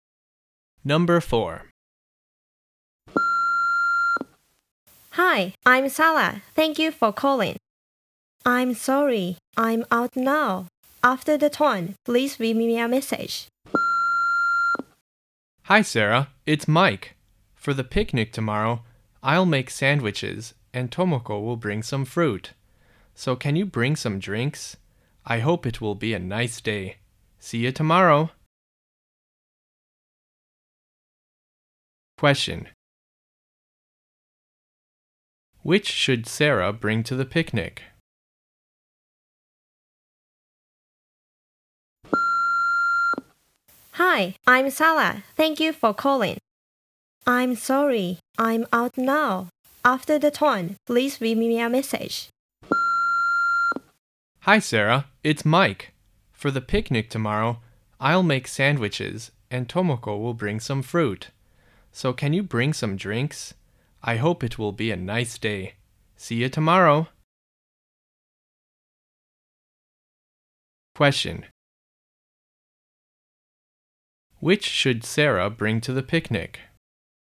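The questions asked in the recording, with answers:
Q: Which should Sarah bring to the picnic?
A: Some drinks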